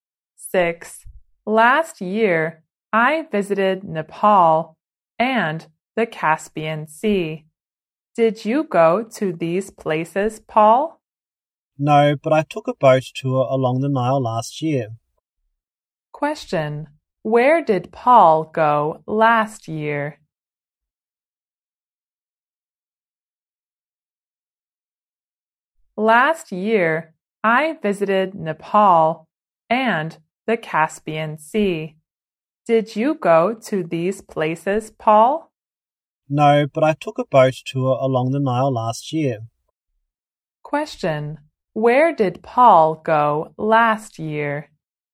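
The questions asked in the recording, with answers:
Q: Where did Paul go last year?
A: Along the Nile (on a boat tour)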